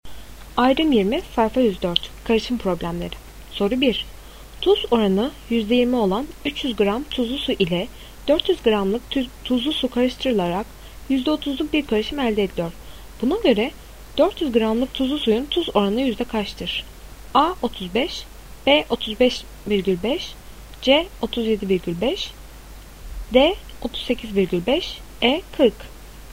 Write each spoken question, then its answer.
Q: Buna göre 400 gramlık tuzlu suyun tuz oranı yüzde kaçtır?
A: Doğru cevap C 37,5.